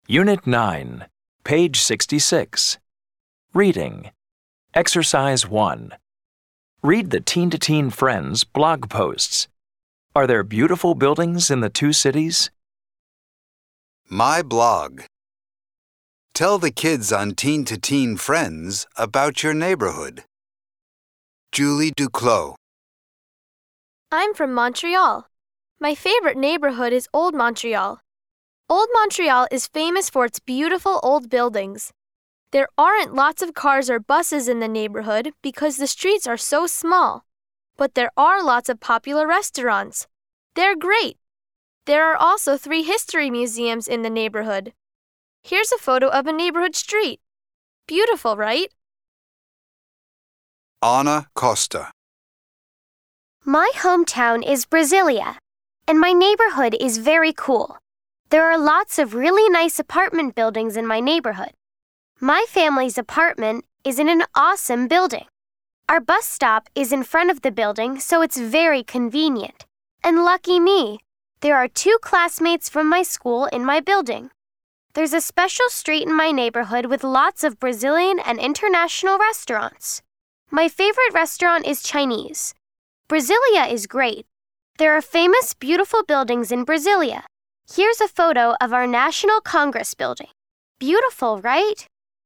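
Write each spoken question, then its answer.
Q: Are there beautiful buildings in the two cities?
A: Yes, there are beautiful buildings in both Montreal and Brasilia.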